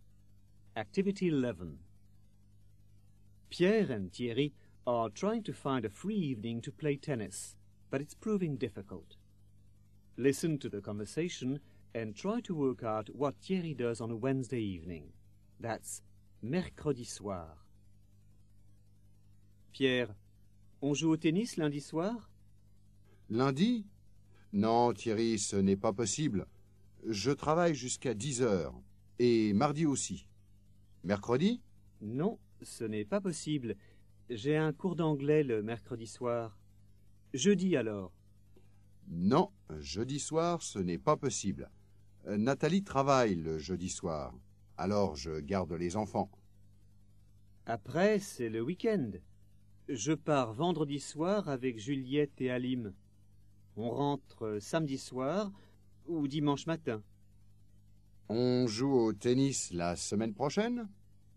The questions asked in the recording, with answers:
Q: Listen to the conversation and try to work out what Thierry does on a Wednesday evening.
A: On a Wednesday evening, Thierry has an English class.